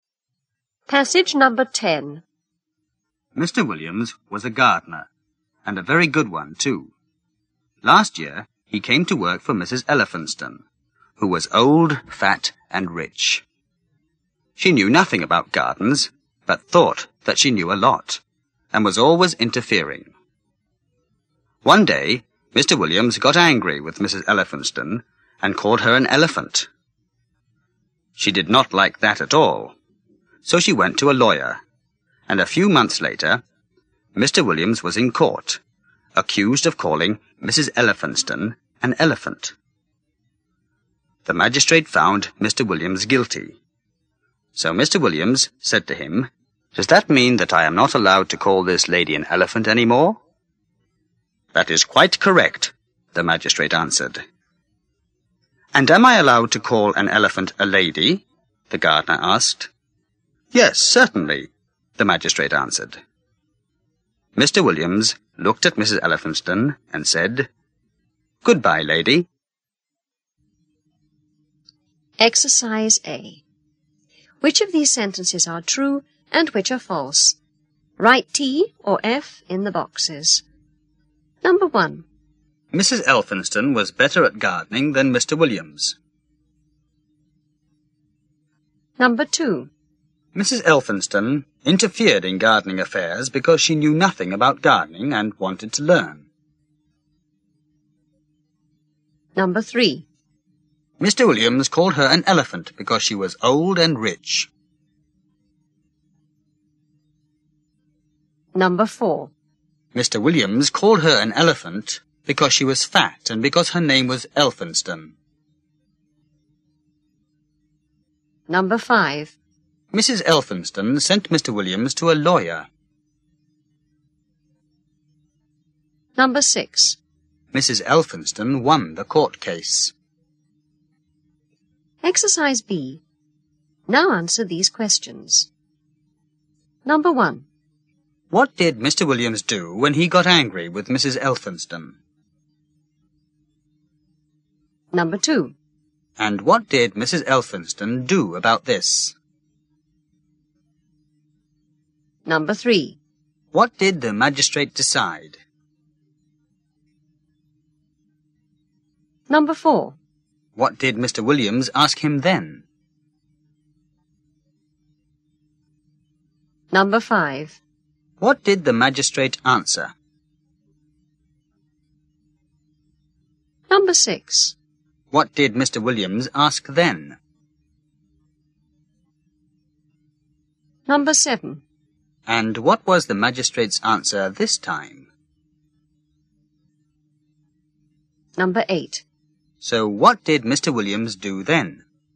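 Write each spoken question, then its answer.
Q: What did Mr. Williams do when he got angry with Mrs. Elphinstone?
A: He called her an elephant.

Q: And what did Mrs. Elphinstone do about this?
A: She went to a lawyer and took him to court.

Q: What did the magistrate decide?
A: That Mr. Williams was guilty.

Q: What did Mr. Williams ask him then?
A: Whether that meant he could no longer call the lady an elephant.

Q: What did the magistrate answer?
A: That is quite correct.

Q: What did Mr. Williams ask then?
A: Whether he was allowed to call an elephant a lady.

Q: And what was the magistrate's answer this time?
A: Yes, certainly.

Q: So what did Mr. Williams do then?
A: He looked at Mrs. Elphinstone and said, "Goodbye, lady."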